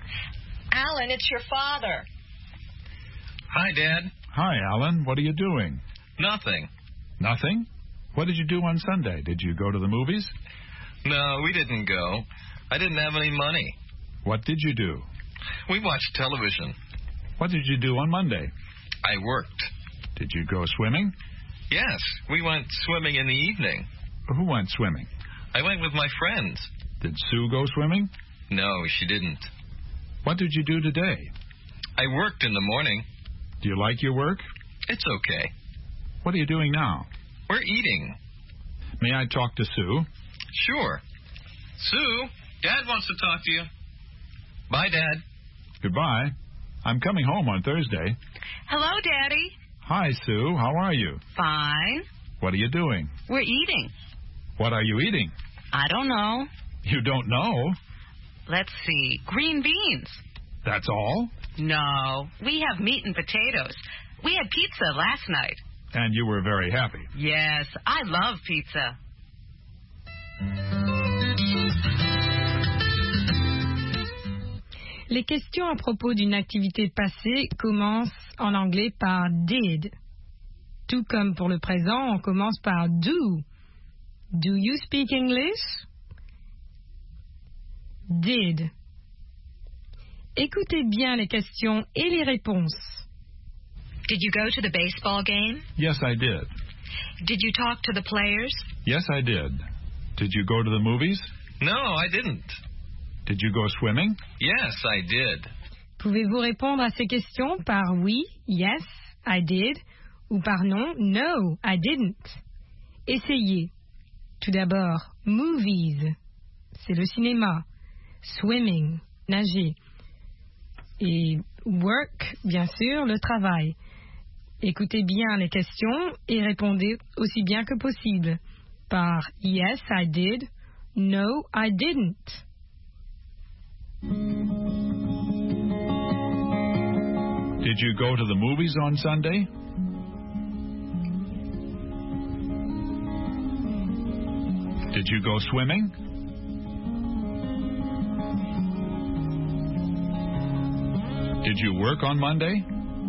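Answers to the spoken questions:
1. No, I didn't.
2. Yes, I did.
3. Yes, I did.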